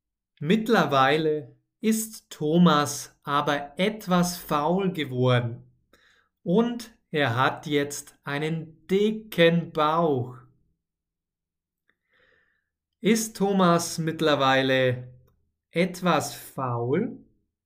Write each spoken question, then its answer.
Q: Ist Thomas mittlerweile etwas faul?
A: Ja, genau. Thomas ist mittlerweile etwas faul.